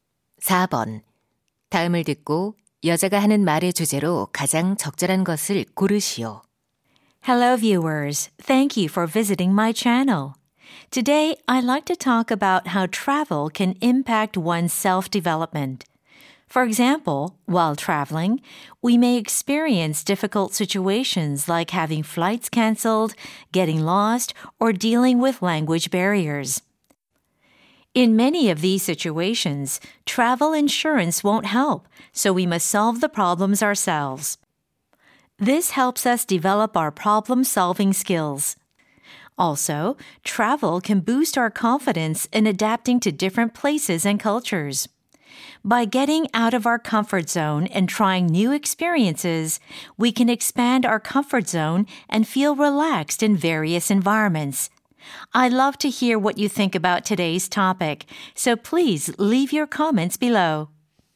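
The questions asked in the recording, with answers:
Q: 다음을 듣고 여자가 하는 말의 주제로 가장 적절한 것을 고르시오.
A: 여행이 자기 계발에 미치는 영향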